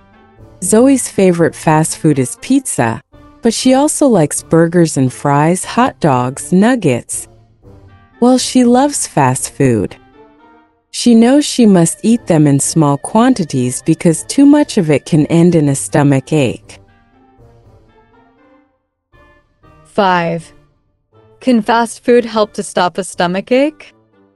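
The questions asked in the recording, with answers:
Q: Can fast food help to stop a stomach ache?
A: No, too much can cause a stomach ache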